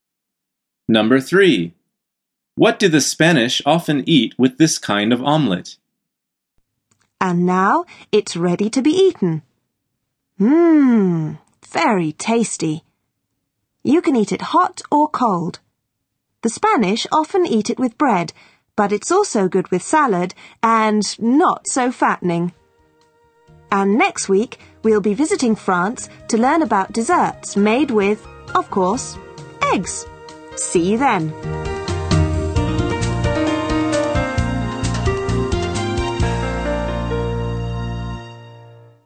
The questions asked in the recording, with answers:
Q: What do the Spanish often eat with this kind of omelette?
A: The answer is bread. She says, the Spanish often eat it with bread, but it's also good with salad.